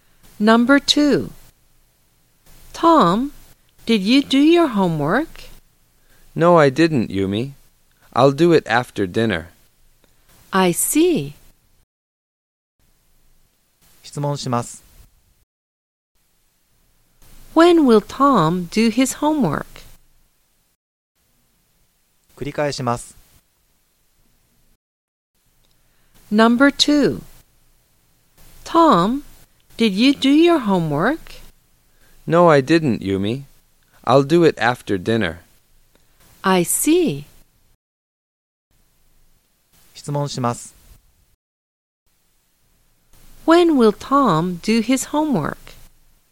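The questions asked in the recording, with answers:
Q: When will Tom do his homework?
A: After dinner.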